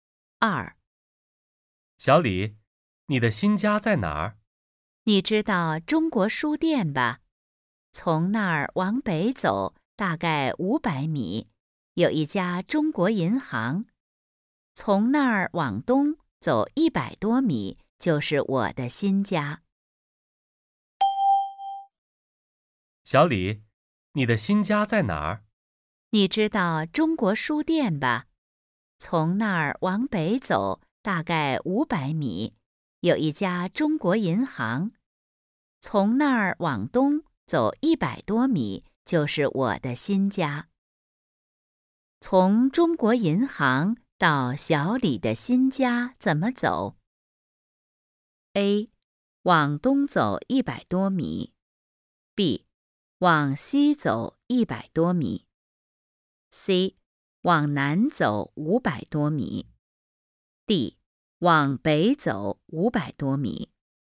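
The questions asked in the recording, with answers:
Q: 从中国银行到小李的新家怎么走?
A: A: 往东走100多米。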